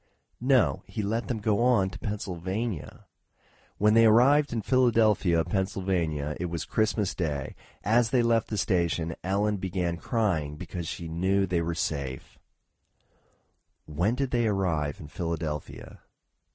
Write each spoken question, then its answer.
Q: When did they arrive in Philadelphia?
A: They arrived in Philadelphia on Christmas Day.